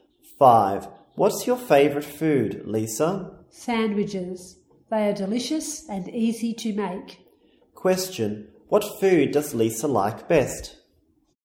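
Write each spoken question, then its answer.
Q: What food does Lisa like best?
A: Sandwiches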